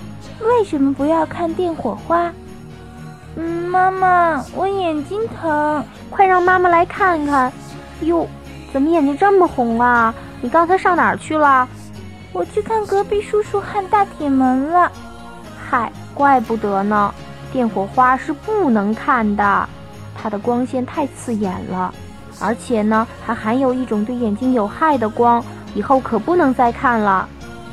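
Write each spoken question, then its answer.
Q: 为什么不要看电火花?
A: 光线太刺眼,而且含有对眼睛有害的光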